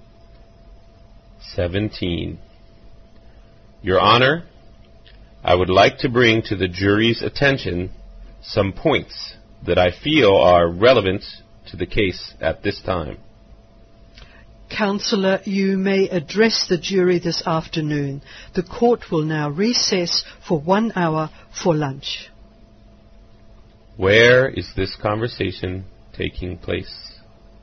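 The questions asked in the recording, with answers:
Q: Where is this conversation taking place?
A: In a courtroom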